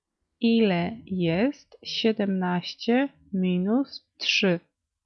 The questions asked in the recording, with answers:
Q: Ile jest 17 minus 3?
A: 14.